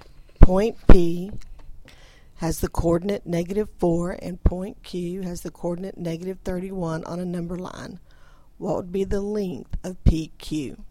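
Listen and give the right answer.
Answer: 27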